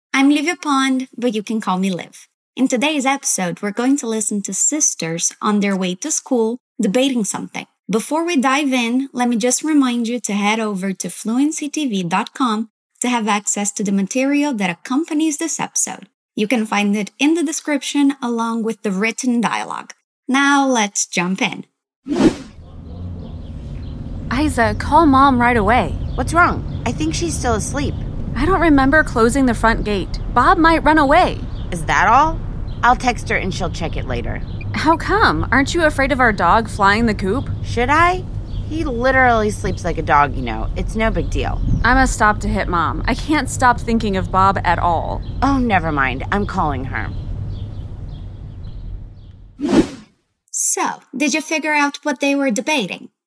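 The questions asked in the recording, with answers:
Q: So, did you figure out what they were debating?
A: Whether to call Mom right away, because the front gate may be open and their dog Bob might run away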